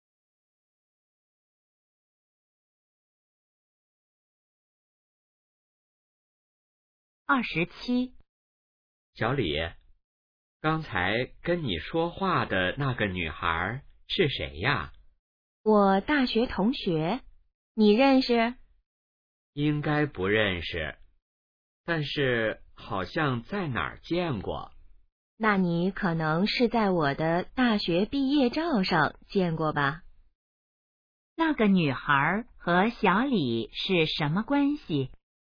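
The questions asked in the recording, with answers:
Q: 那个女孩和小李是什么关系?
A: 大学同学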